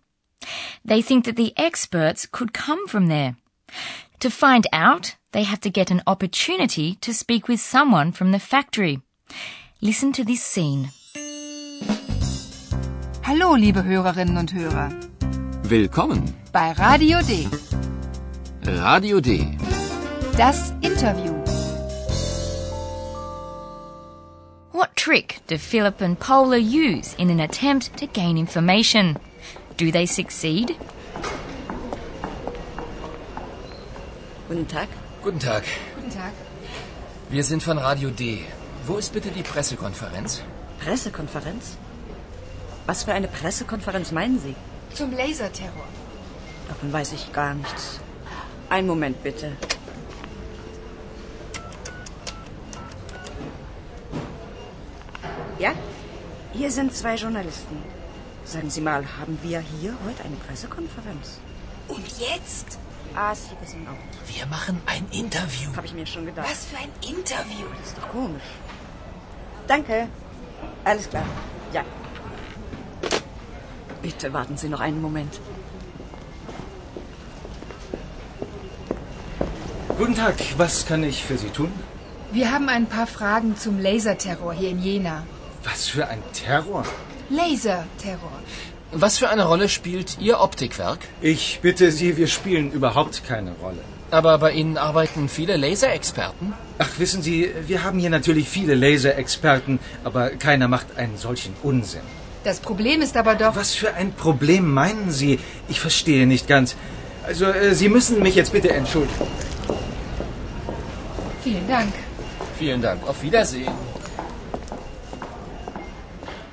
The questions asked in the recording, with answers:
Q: What trick do Philip and Paula use in an attempt to gain information?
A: They go into the optics factory and pretend that a press conference has been announced.

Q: Do they succeed?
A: But they unfortunately didn't get any more precise information